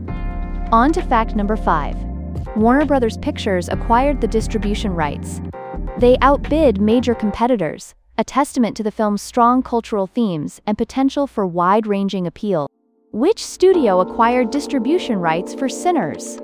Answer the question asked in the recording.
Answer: Correct answer, Warner Brothers Pictures.